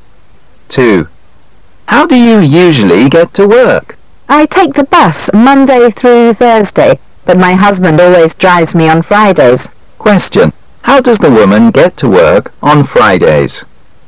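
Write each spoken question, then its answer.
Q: How does the woman get to work on Fridays?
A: Her husband drives her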